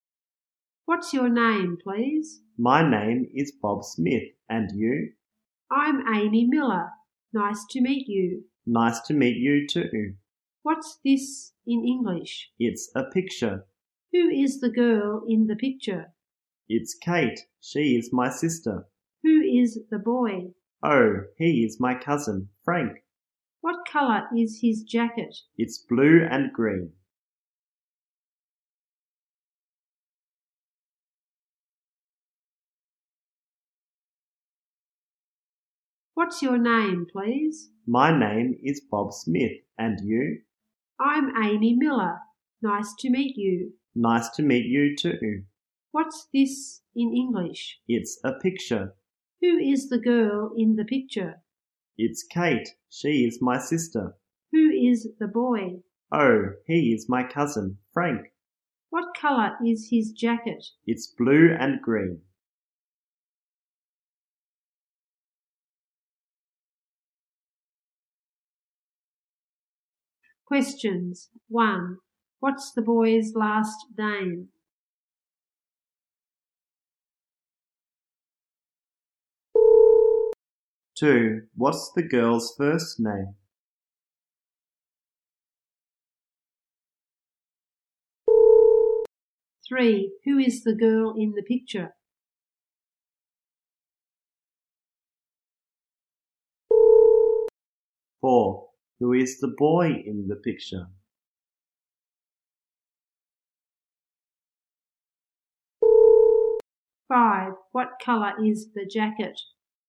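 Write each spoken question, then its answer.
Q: What's the boy's last name?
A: Smith

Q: What's the girl's first name?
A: Amy

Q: What color is the jacket?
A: Blue and green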